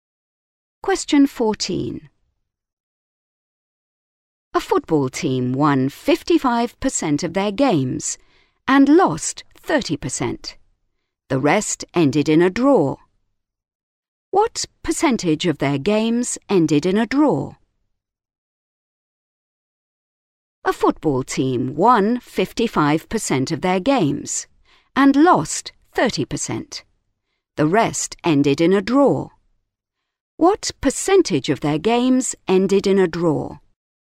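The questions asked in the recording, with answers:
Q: What percentage of their games ended in a draw?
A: 15%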